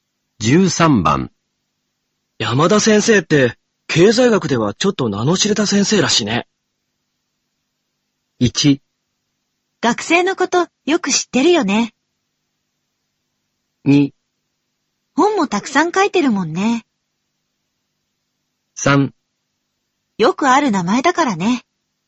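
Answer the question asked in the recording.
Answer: 2: 本もたくさん書いてるもんね。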